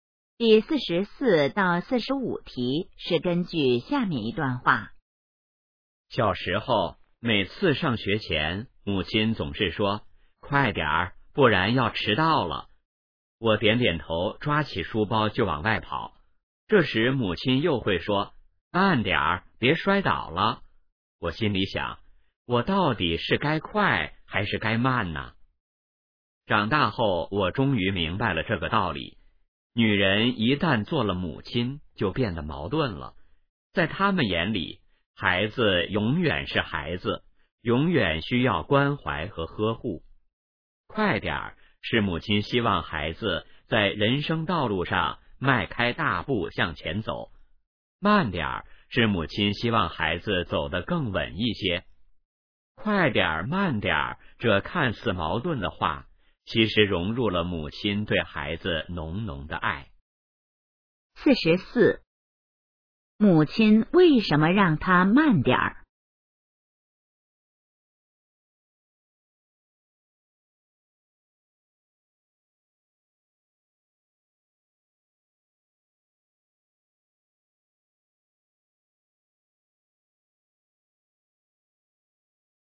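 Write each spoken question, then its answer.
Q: 母亲为什么让他慢点儿?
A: 希望孩子走得更稳,别摔倒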